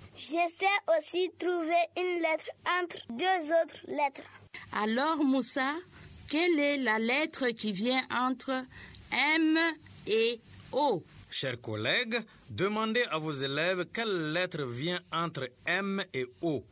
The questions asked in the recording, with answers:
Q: Alors, Moussa, quelle est la lettre qui vient entre M et O?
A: Ah, Moussa, c'est exactement la lettre N.